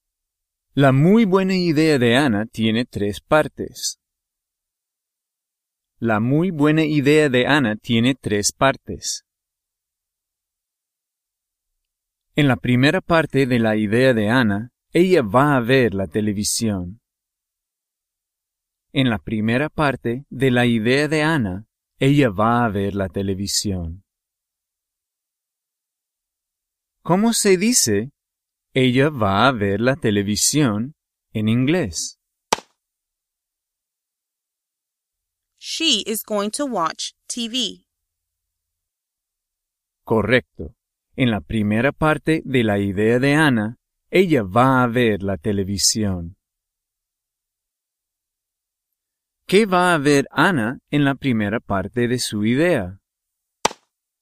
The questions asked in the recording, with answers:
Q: ¿Qué va a ver Anna en la primera parte de su idea?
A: La televisión.